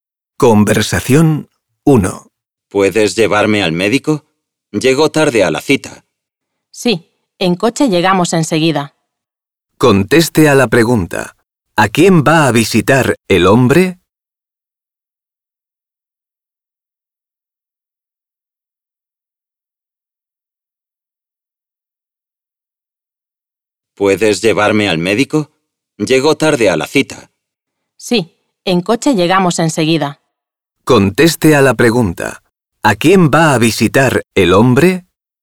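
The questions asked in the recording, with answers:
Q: ¿A quién va a visitar el hombre?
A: Al médico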